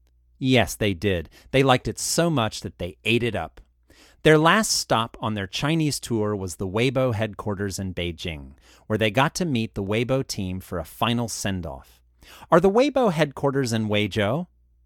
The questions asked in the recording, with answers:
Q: Are the Weibo headquarters in Weizhou?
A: No, the Weibo headquarters are in Beijing.